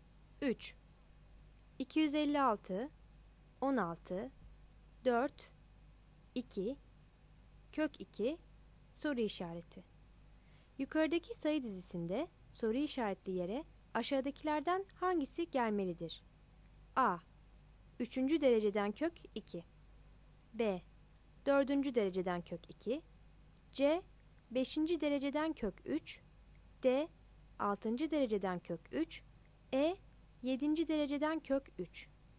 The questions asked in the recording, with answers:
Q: Yukarıdaki sayı dizisinde soru işaretli yere aşağıdakilerden hangisi gelmelidir?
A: Cevap B'dir.